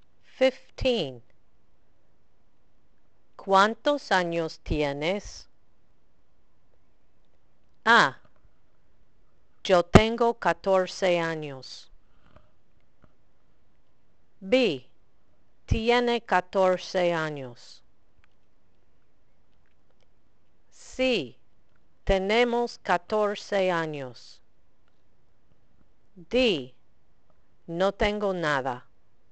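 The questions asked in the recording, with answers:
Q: ¿Cuántos años tienes?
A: A: yo tengo 14 años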